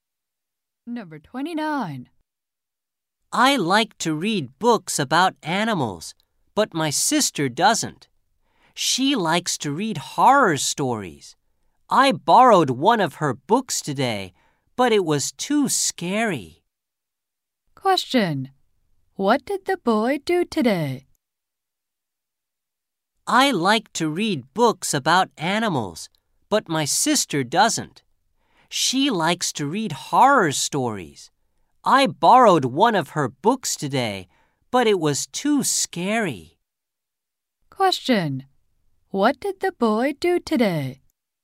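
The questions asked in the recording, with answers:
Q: What did the boy do today?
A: He borrowed one of his sister's books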